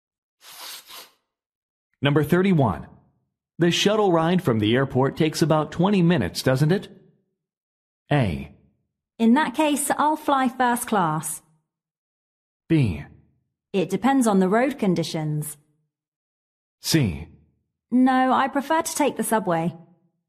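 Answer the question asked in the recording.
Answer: B: It depends on the road conditions.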